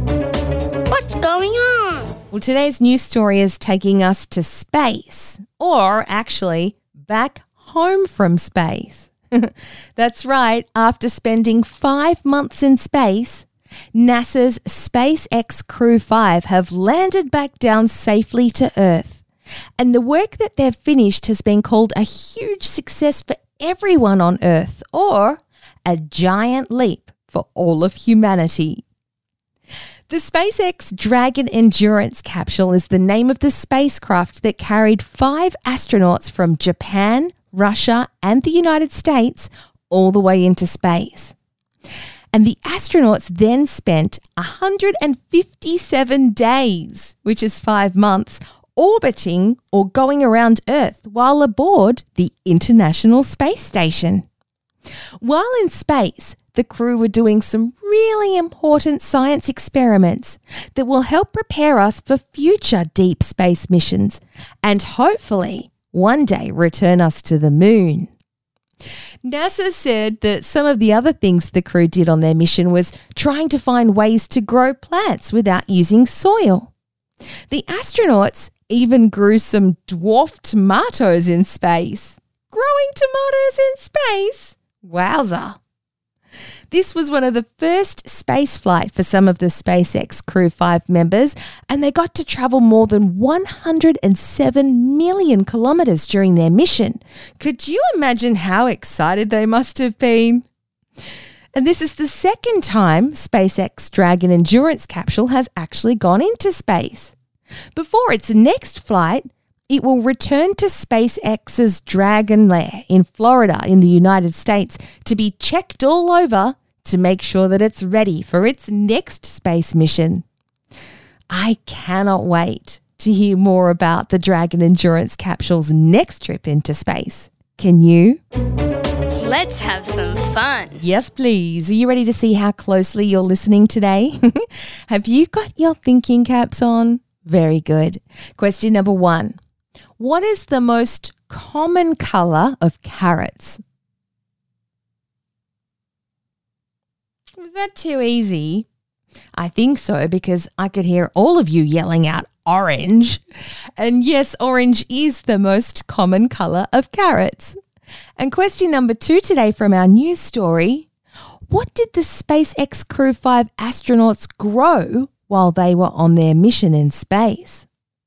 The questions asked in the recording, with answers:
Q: What did the SpaceX Crew 5 astronauts grow while they were on their mission in space?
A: If you said tomatoes or dwarf tomatoes, then you should give yourself a really big pat on the back.